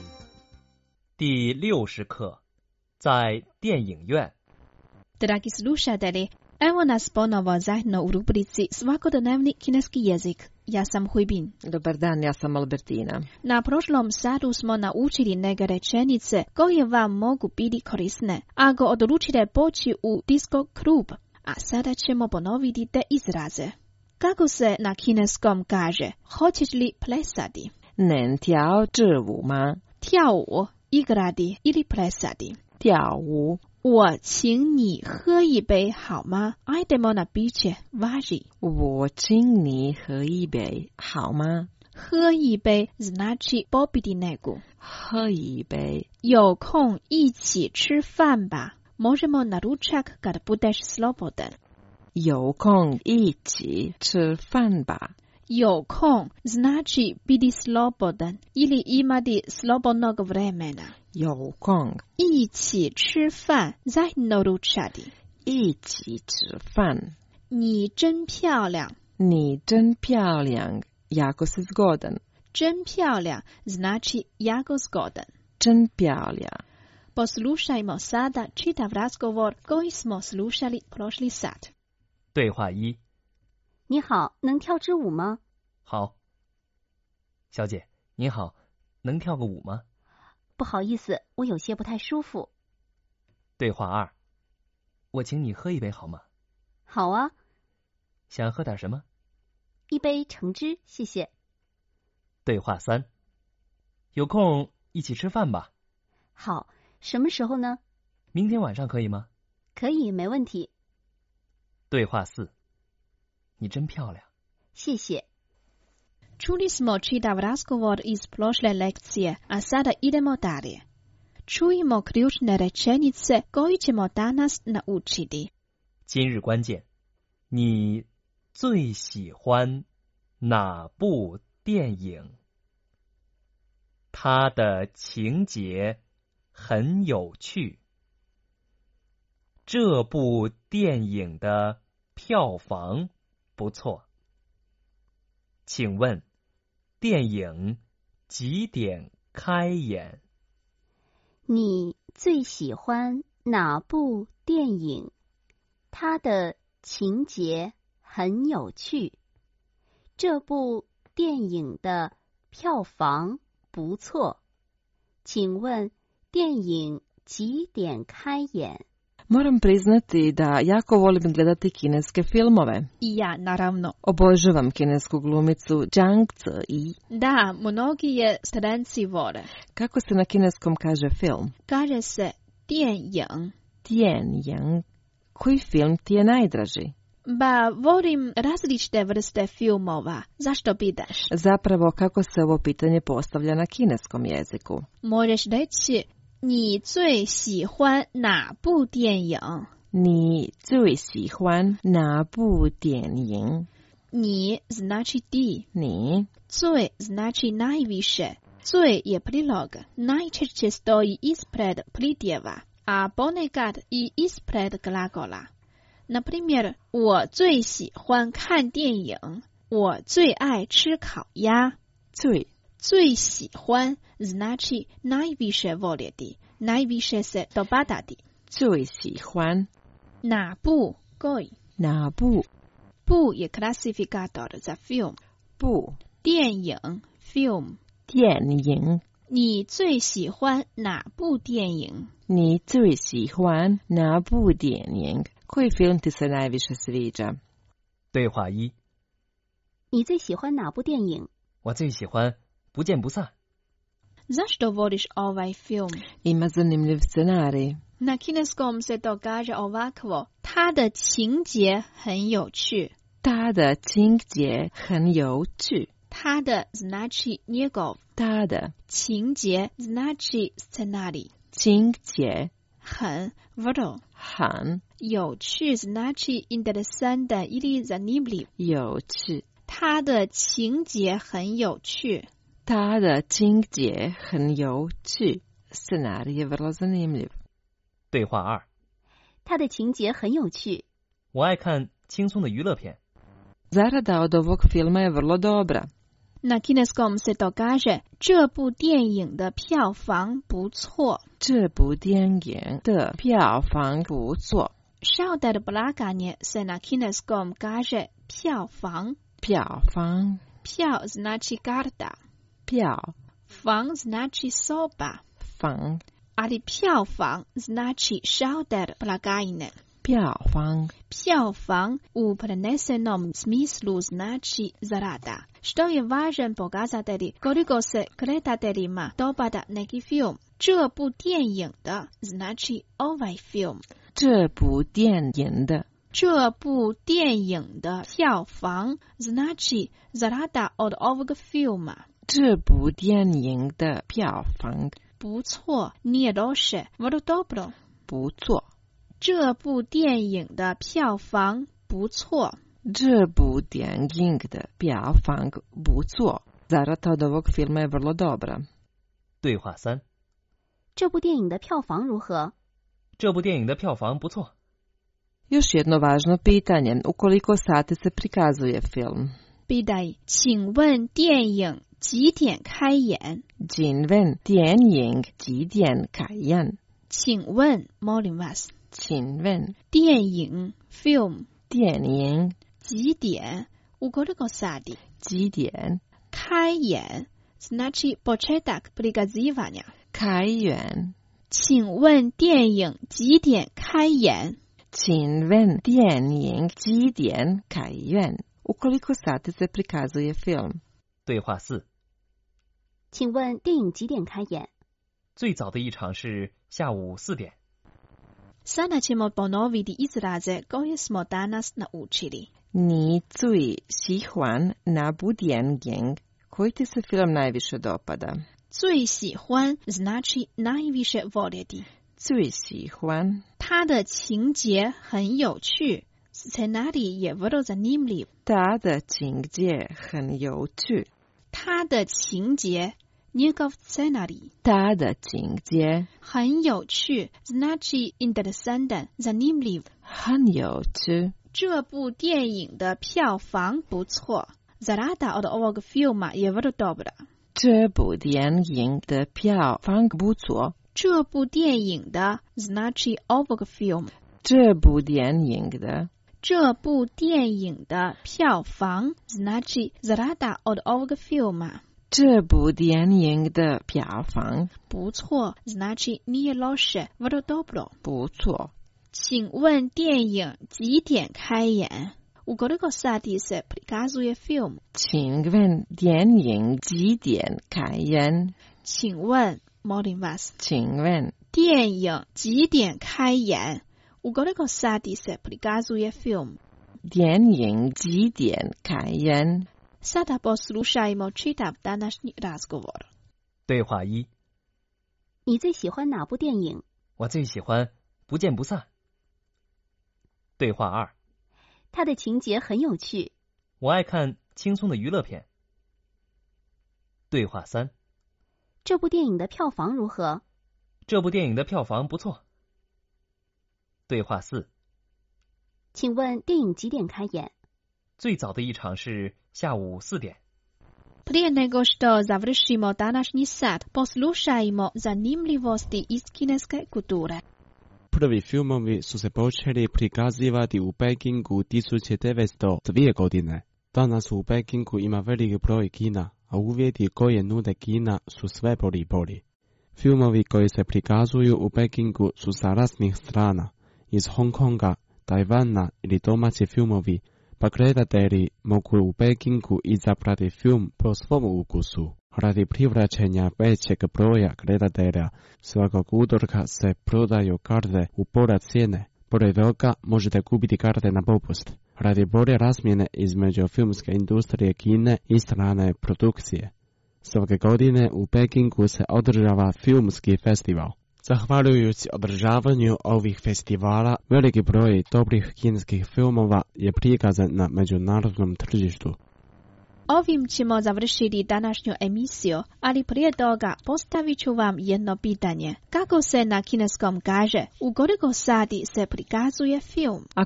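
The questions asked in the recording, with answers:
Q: Kako se na kineskom kaže, u koliko sati se prikazuje film?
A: 请问电影几点开演?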